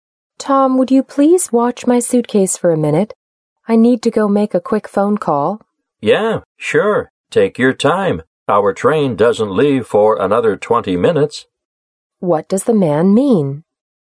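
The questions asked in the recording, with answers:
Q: What does the man mean?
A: He'll gladly watch the suitcase; there's plenty of time before the train leaves.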